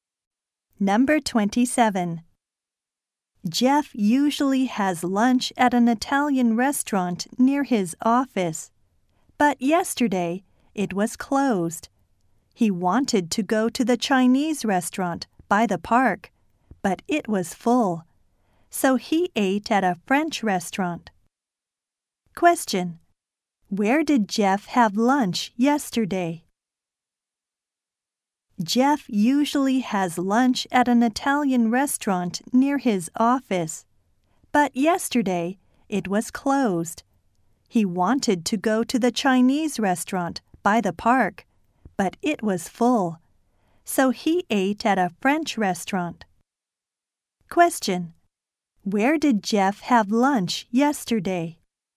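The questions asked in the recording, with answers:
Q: Where did Jeff have lunch yesterday?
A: At a French restaurant.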